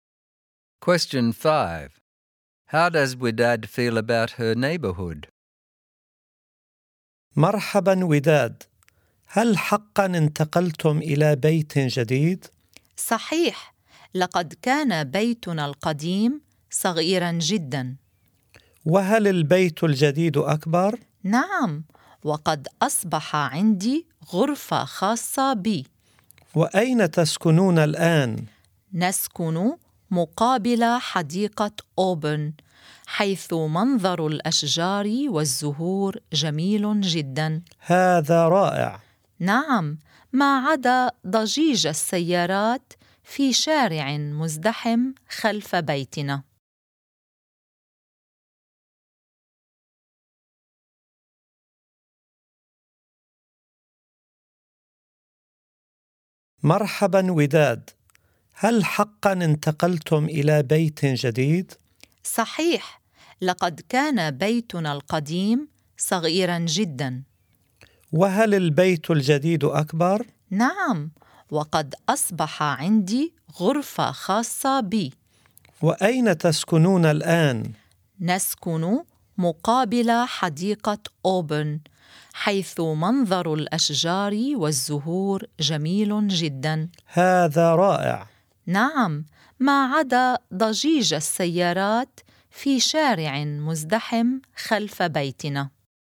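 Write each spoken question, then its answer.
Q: How does Wydad feel about her neighborhood?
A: She likes the view of the park's trees and flowers, but not the traffic noise from the busy street behind the house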